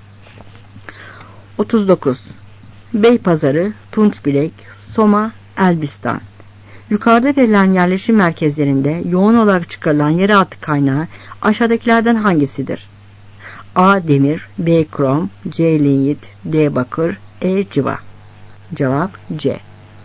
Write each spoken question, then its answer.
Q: Yukarıda verilen yerleşim merkezlerinde yoğun olarak çıkarılan yeraltı kaynağı aşağıdakilerden hangisidir?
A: Cevap C.